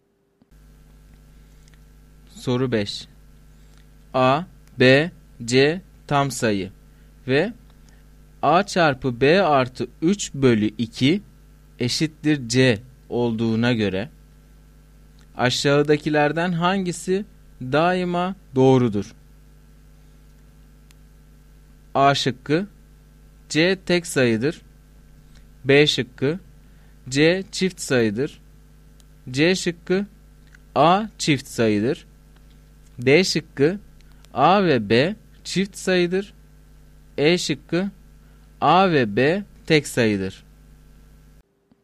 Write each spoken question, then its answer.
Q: A, B, C tam sayı ve A çarpı B artı 3 bölü 2 eşittir C olduğuna göre aşağıdakilerden hangisi daima doğrudur?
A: Doğru cevap E şıkkı.